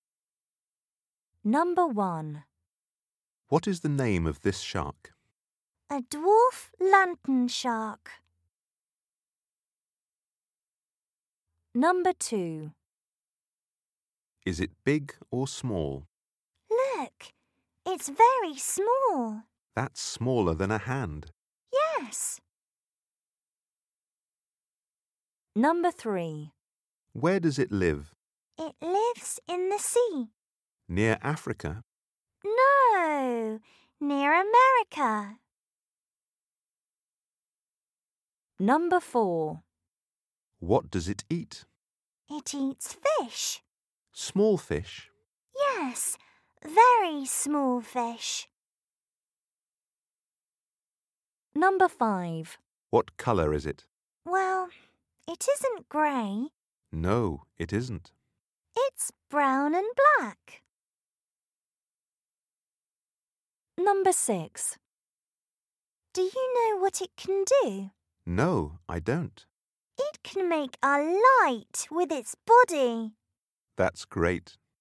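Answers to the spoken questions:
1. A dwarf lantern shark
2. Very small (smaller than a hand)
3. In the sea near America
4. Very small fish
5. Brown and black
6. It can make a light with its body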